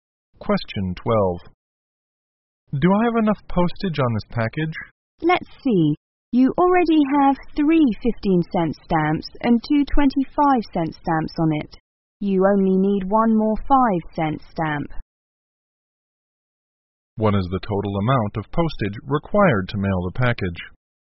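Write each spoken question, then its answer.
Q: What is the total amount of postage required to mail the package?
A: $1.00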